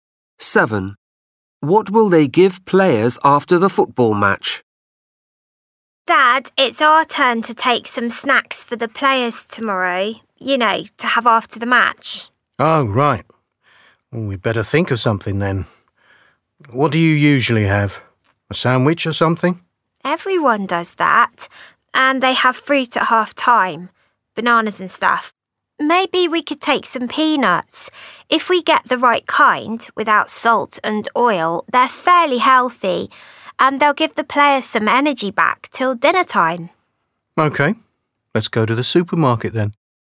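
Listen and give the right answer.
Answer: peanuts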